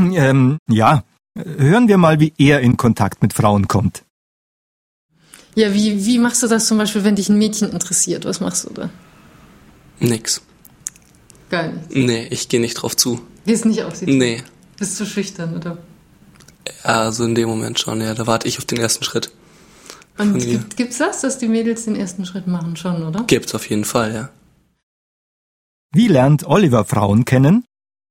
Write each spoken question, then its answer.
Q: Wie lernt Oliver Frauen kennen?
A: Er wartet auf den ersten Schritt von der Frau.